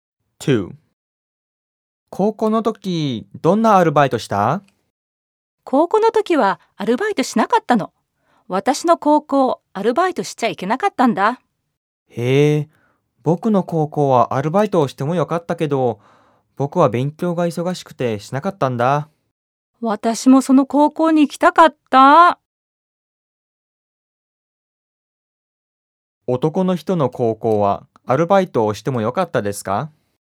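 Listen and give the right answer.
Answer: はい、してもよかったです。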